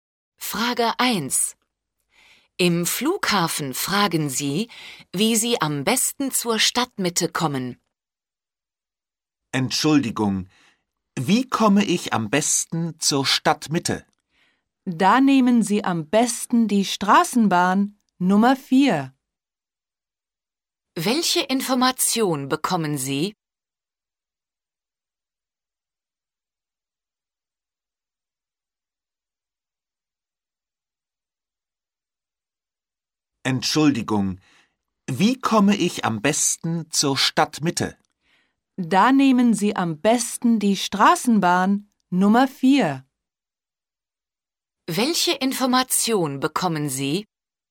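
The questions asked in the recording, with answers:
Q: Welche Information bekommen Sie?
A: Am besten nimmt man die Straßenbahn Nummer 4.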